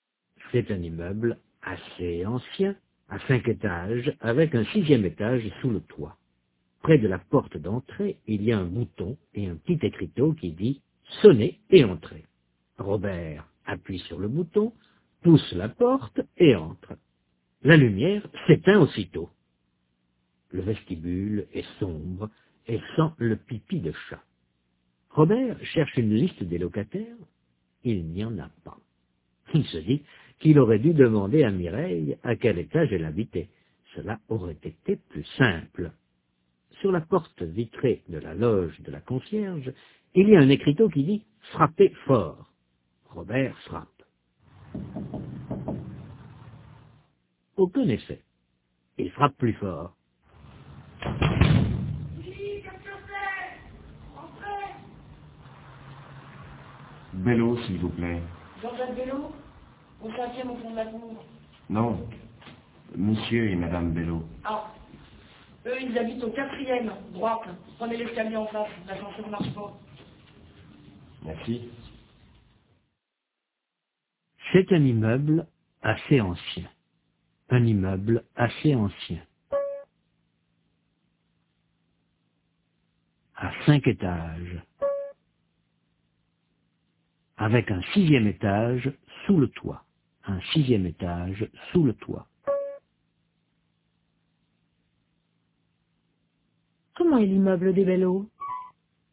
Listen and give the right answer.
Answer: Assez ancien, à 5 étages.